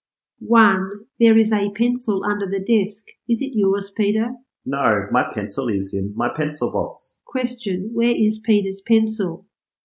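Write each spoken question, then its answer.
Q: Question, where is Peter's pencil?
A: In his pencil box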